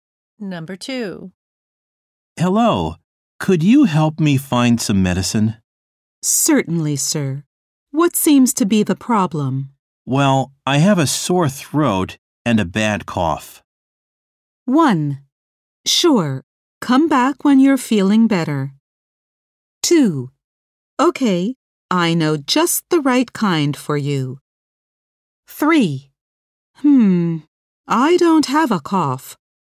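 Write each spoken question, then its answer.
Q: Well, I have a sore throat and a bad cough.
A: 2: Okay, I know just the right kind for you.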